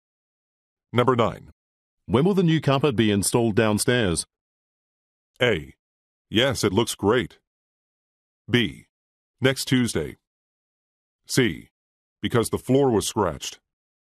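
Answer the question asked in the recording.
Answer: B: Next Tuesday.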